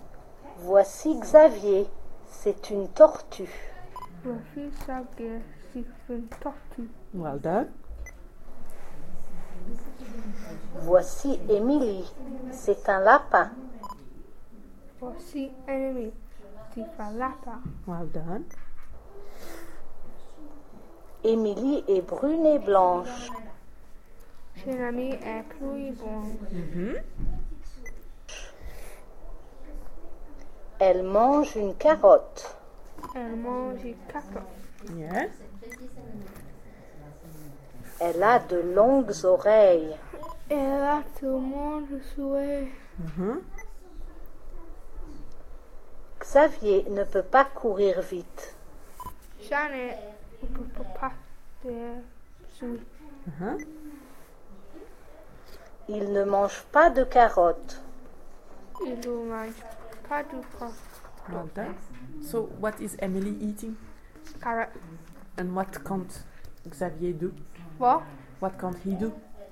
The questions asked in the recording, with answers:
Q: So, what is Emily eating?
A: Carrot.

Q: What can't he do?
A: Run.